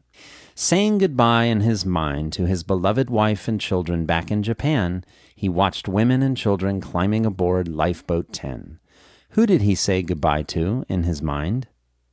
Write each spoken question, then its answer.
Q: Who did he say goodbye to in his mind?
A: He said goodbye in his mind to his wife and children back in Japan.